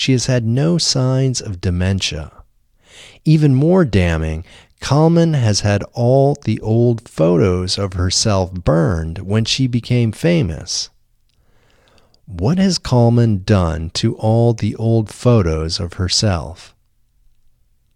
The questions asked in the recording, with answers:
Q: What has Kalman done to all the old photos of herself?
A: Kalman has had all the old photos of herself burned when she became famous.